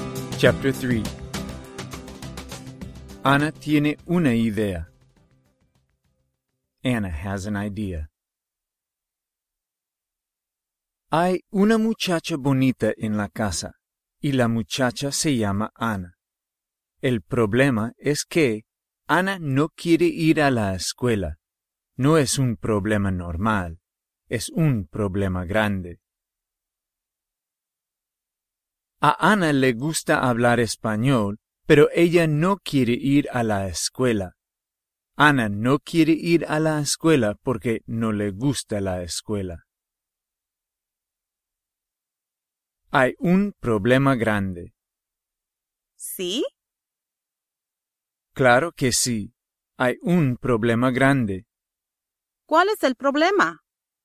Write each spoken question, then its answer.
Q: ¿Cuál es el problema?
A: Anna quiere hablar español, pero ella no quiere ir a la escuela.